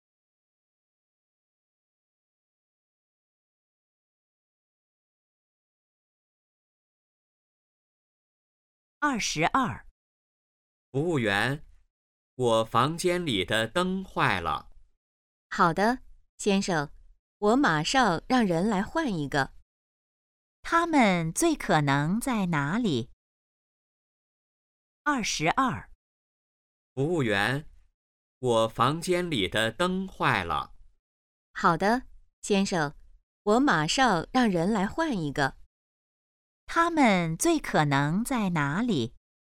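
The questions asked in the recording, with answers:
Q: 他们最可能在哪里?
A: 宾馆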